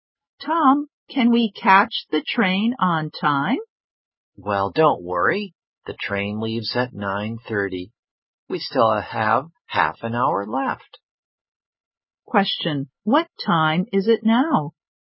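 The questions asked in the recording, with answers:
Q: Question, what time is it now?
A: 9:00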